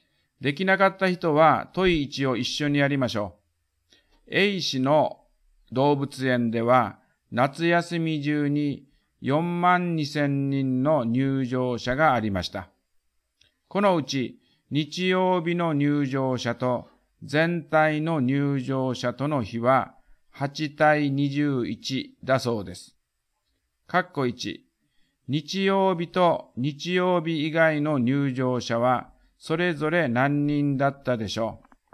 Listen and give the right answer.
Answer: 日曜日が1万6000人。